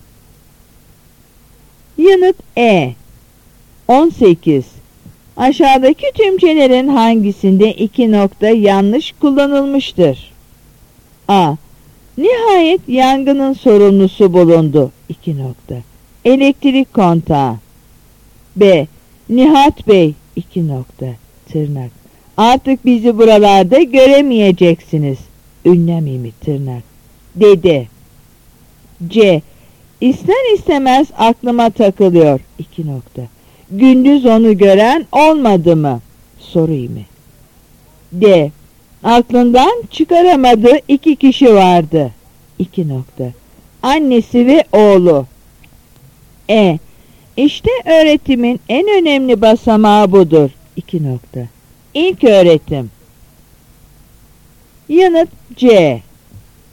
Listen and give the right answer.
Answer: Yanıt C.